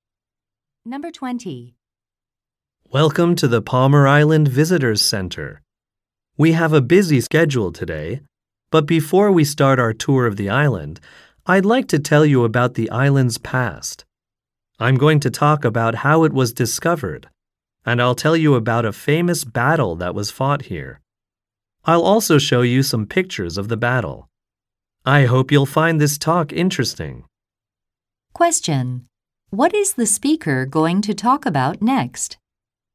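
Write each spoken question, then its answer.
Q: What is the speaker going to talk about next?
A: The island's past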